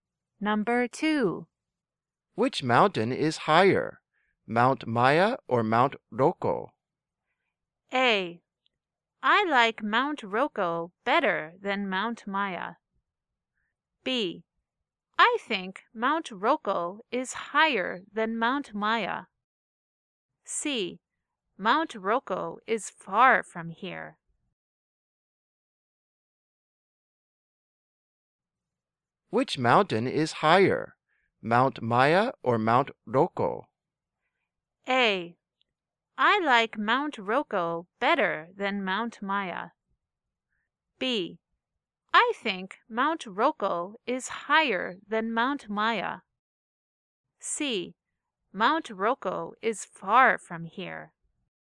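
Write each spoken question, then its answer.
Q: Which mountain is higher, Mount Maya or Mount Roko?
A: B: I think Mount Roko is higher than Mount Maya.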